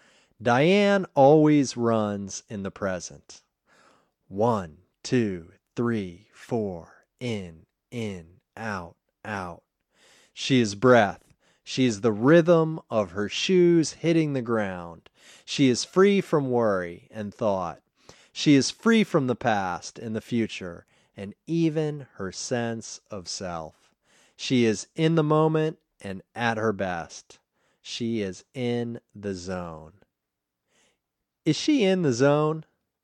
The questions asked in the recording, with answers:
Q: Is she in the zone?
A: Yes, she is in the zone.